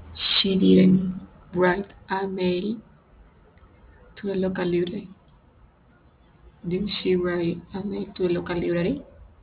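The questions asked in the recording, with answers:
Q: Did she write a mail to the local library?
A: No, she didn't.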